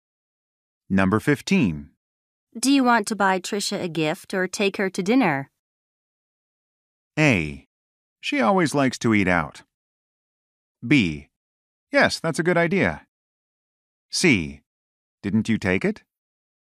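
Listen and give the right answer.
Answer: A: She always likes to eat out.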